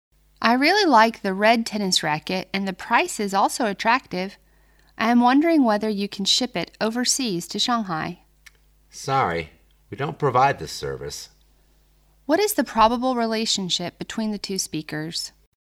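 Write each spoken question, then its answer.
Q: What is the probable relationship between the two speakers?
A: Customer and shop assistant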